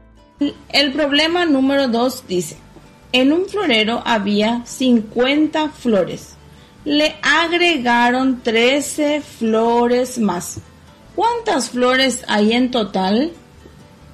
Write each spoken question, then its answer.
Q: ¿Cuántas flores hay en total?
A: 63 flores tenemos en total.